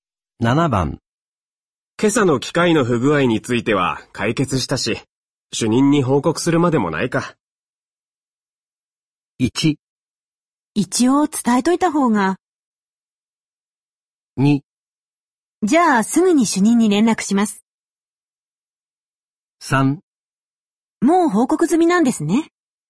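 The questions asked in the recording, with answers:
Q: 今朝の機械の不具合については解決したし、主任に報告するまでもないか。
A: 1: 一応伝えといた方が。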